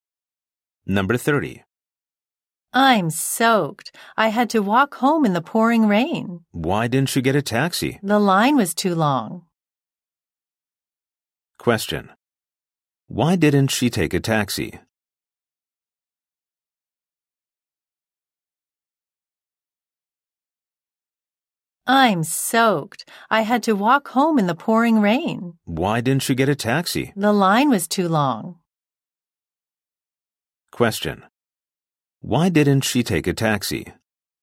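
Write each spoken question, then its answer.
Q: Why didn't she take a taxi?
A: The line was too long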